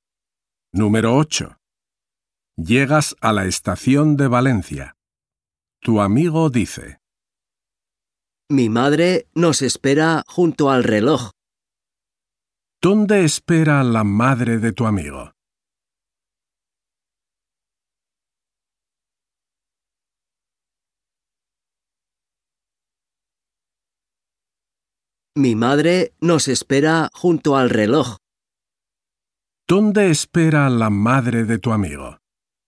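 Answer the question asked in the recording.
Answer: Junto al reloj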